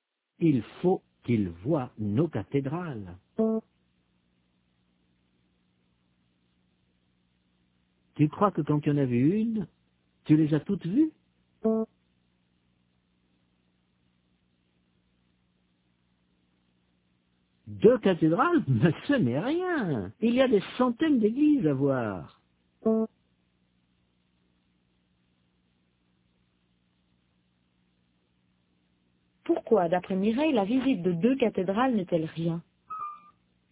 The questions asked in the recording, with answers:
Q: Pourquoi, d'après Mireille, la visite de deux cathédrales n'est-elle rien?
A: Parce qu'il y a des centaines d'églises à voir.